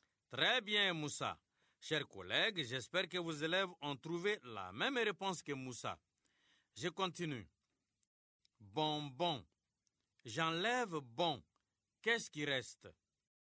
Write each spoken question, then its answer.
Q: Bonbon. J'enlève bon. Qu'est-ce qui reste?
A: Monsieur, il reste bon.